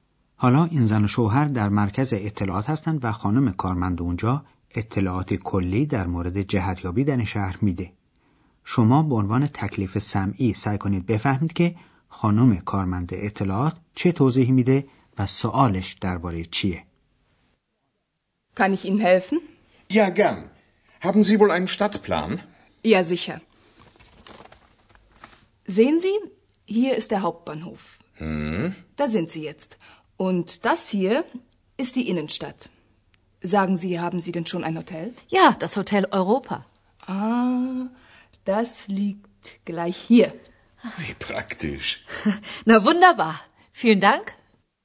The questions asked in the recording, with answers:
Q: خانم کارمند اطلاعات چه توضیحی میده و سوالش درباره چیه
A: پس خانم کارمن در روی نقشه شهر نشان داد که زن و شوهر الان در کجا هستند.